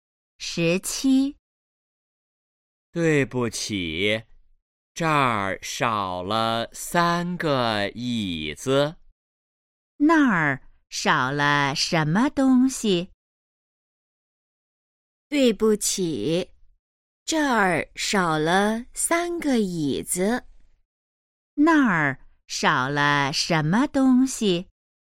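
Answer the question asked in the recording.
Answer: 三个椅子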